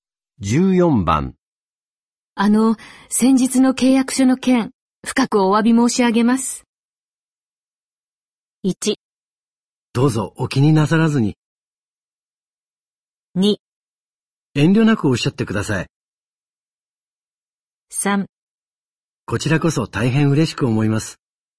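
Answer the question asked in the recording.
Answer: 1: どうぞお気になさらずに。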